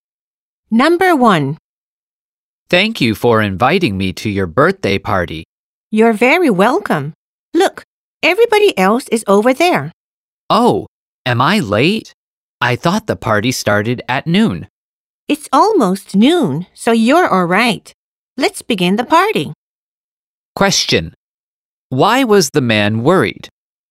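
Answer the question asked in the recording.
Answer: He thought he was late for the party.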